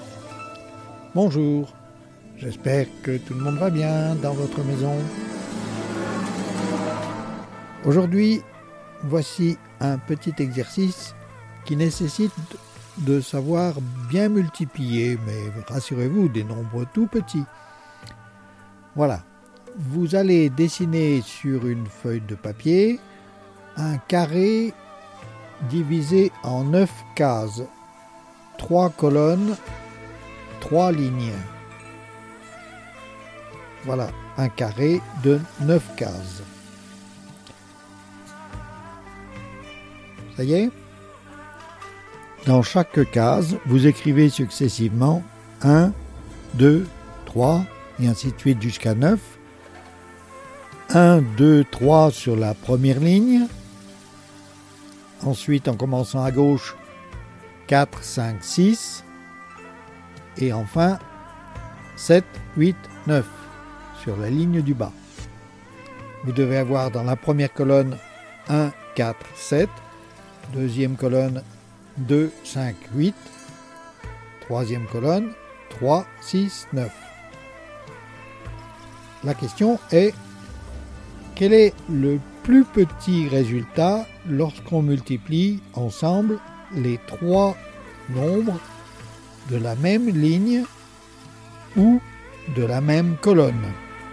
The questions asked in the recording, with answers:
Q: La question est, quel est le plus petit résultat lorsqu'on multiplie ensemble les trois nombres de la même ligne ou de la même colonne ?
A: c'est 6 en multipliant 1 multiplié par 2 multiplié par 3.